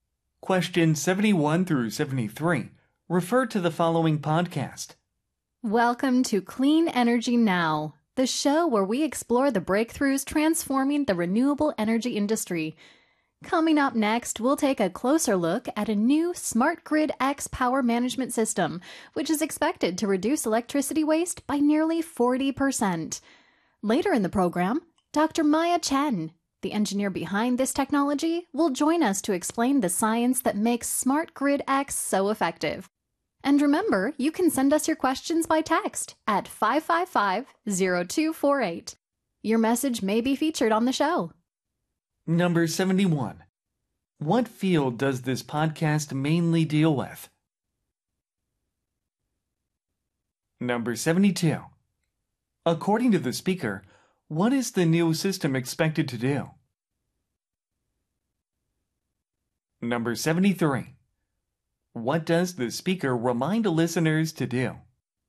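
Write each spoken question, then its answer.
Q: What field does this podcast mainly deal with?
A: Renewable energy

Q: According to the speaker, what is the new system expected to do?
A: Reduce electricity waste by nearly 40%

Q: What does the speaker remind listeners to do?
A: Send questions by text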